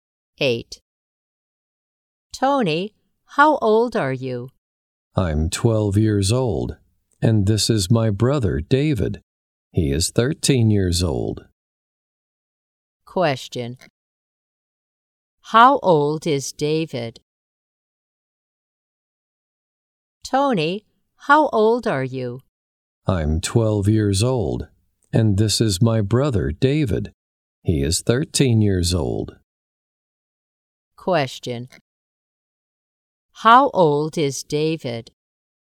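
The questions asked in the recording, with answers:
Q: How old is David?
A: 13 years old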